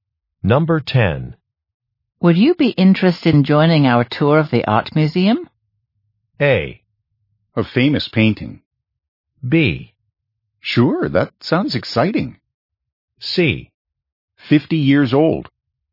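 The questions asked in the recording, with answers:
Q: Would you be interested in joining our tour of the art museum?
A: B: Sure, that sounds exciting.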